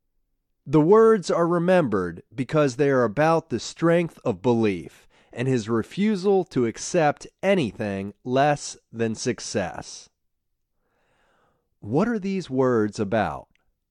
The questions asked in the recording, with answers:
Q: What are these words about?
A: They are about the strength of belief and the refusal to accept anything less than success.